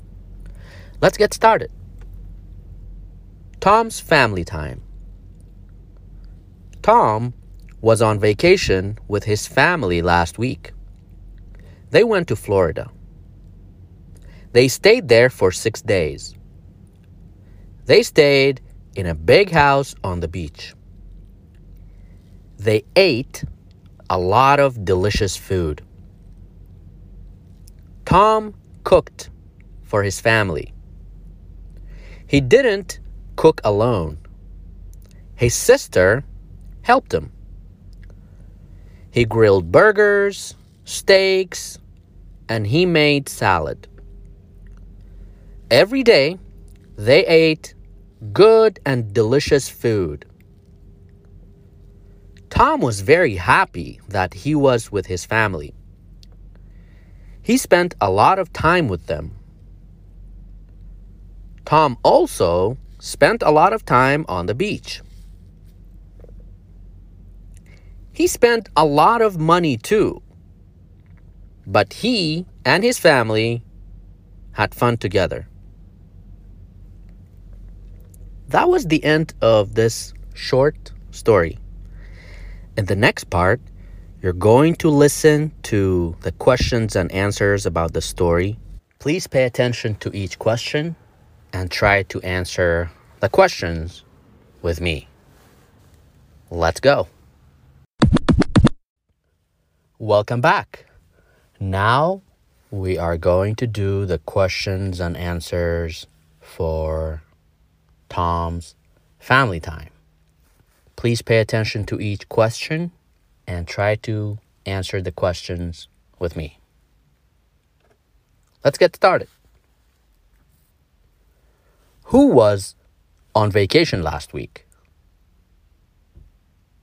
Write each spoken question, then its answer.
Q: Who was on vacation last week?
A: That's right, Tom. Tom was on vacation last week.